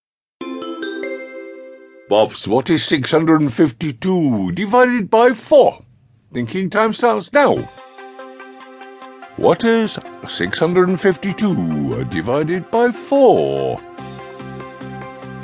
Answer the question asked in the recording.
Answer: 163.